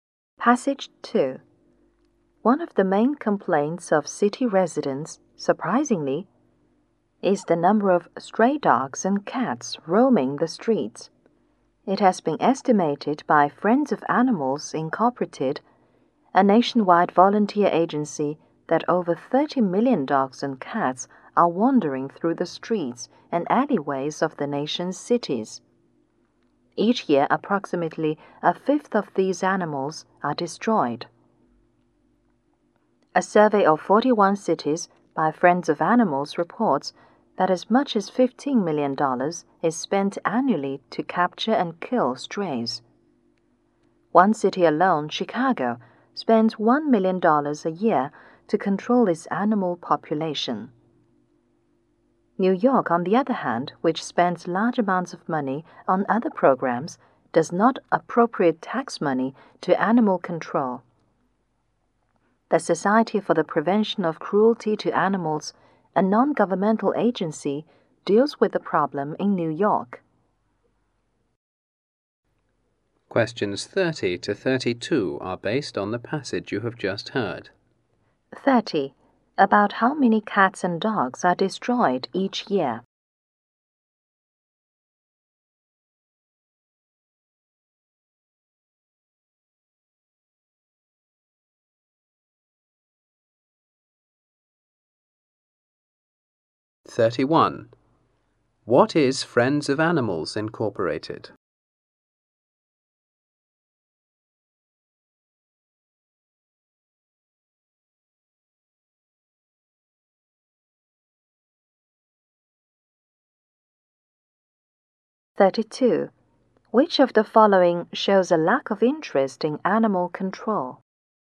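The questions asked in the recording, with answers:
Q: About how many cats and dogs are destroyed each year?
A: About 6 million.

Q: What is Friends of Animals Incorporated?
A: A nationwide volunteer agency.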